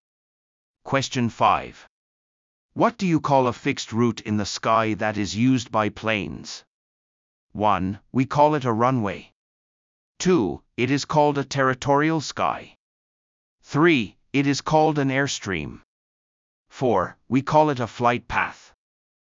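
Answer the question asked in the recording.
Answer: 4: We call it a flight path.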